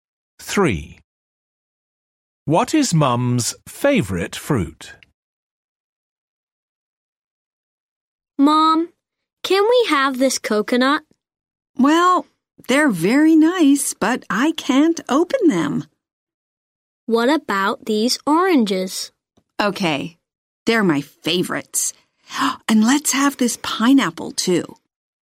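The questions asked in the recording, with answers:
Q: What is Mum's favourite fruit?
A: Oranges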